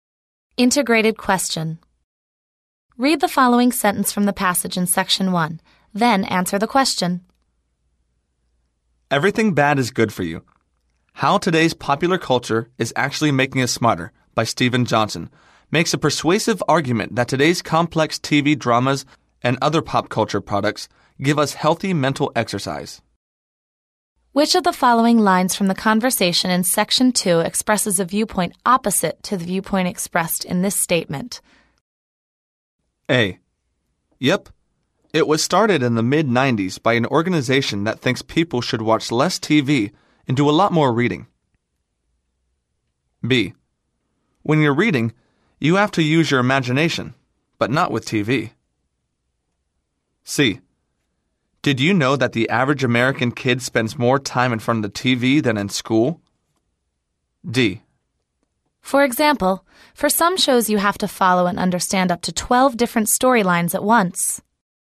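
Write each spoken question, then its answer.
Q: Which of the following lines from the conversation in Section 2 expresses a viewpoint opposite to the viewpoint expressed in this statement?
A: B: When you're reading, you have to use your imagination, but not with TV.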